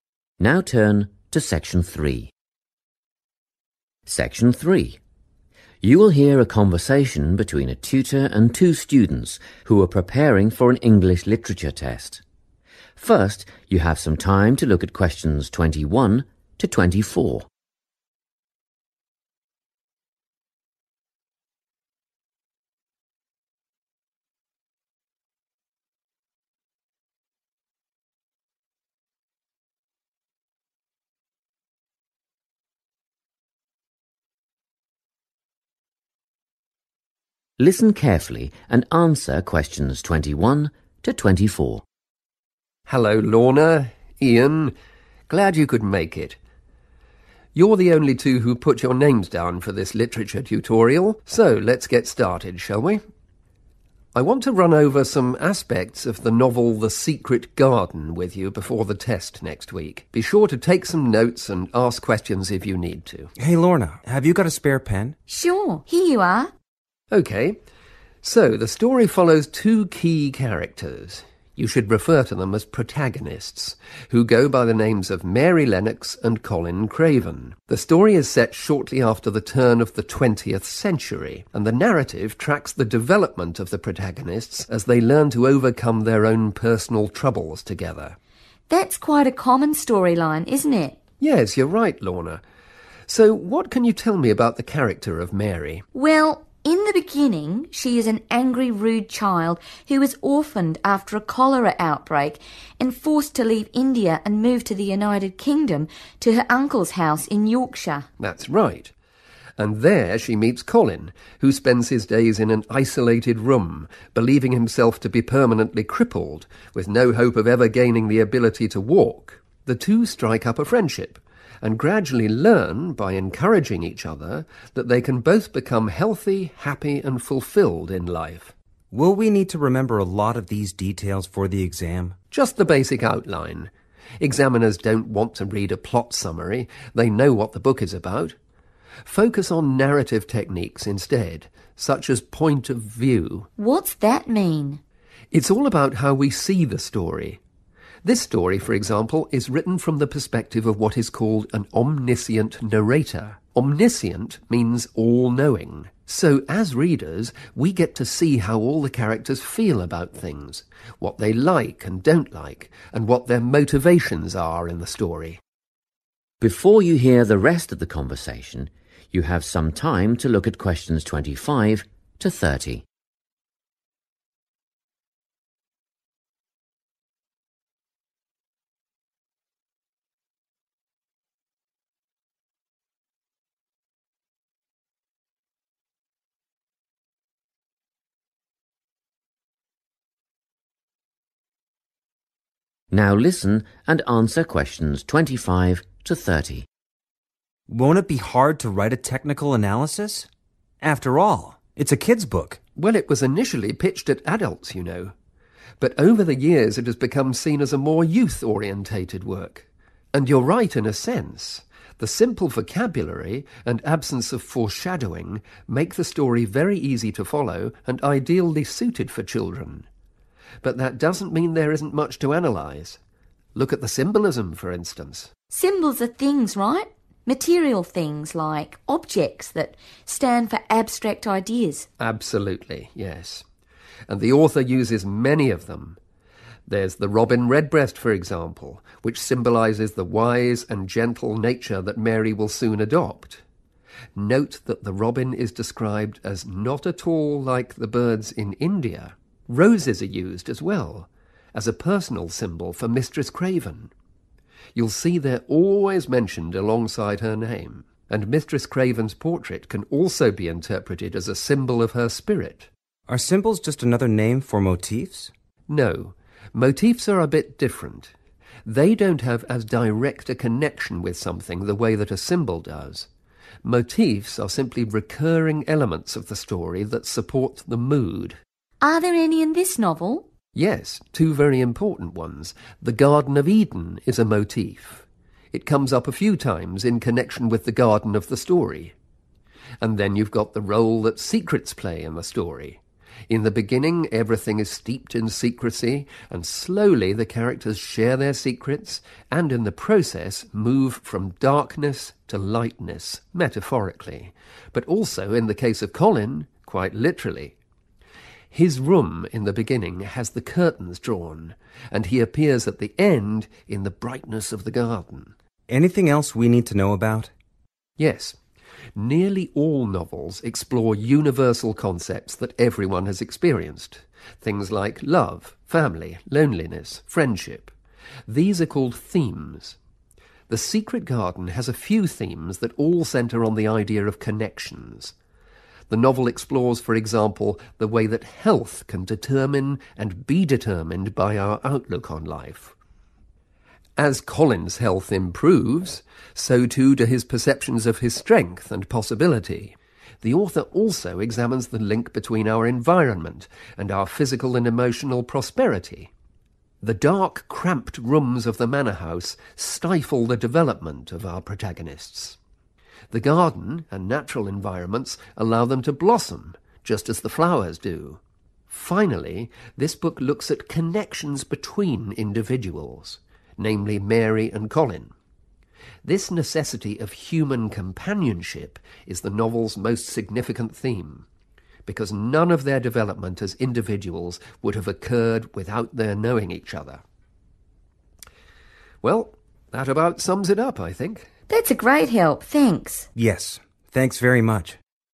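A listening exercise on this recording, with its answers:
Complete the notes below. Write no more than three words for each answer.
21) Novel: (21) .....................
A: The Secret Garden

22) Time period: Early in (22) .....................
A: the 20th century

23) Mary moves to the UK – meets Colin who thinks he'll never be able to (23) ...................... They become friends.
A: walk

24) Point of view: "Omniscient" – narrator knows all about characters' feelings, opinions, and (24) .....................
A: motivations

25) Symbols (physical items that represent (25) .....................): the robin redbreast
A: abstract ideas

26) (26) .....................the portrait of Mistress Craven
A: roses

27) secrecy – metaphorical and literal transition from (27) .....................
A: darkness to lightness

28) Themes: Connections between (28) ..................... and outlook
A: health

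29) (29) ..................... and well-being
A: environment

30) individuals and the need for (30) .....................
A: companionship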